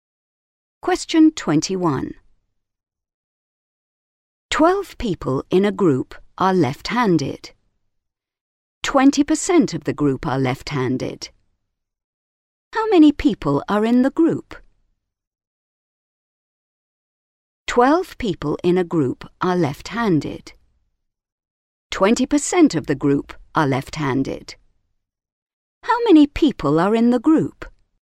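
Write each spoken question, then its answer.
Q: How many people are in the group?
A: 60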